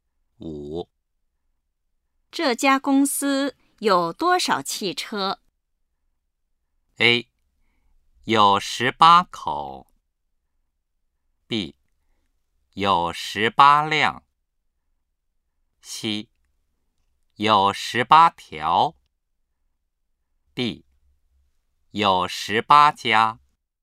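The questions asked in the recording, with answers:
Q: 这家公司有多少汽车?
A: B: 有18辆。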